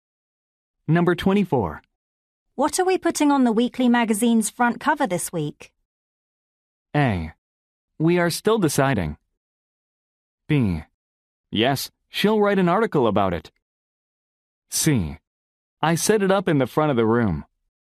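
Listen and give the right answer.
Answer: A: We are still deciding.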